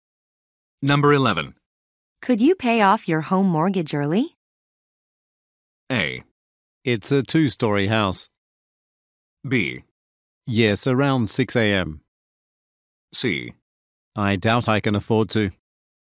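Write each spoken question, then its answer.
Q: Could you pay off your home mortgage early?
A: C: I doubt I can afford to.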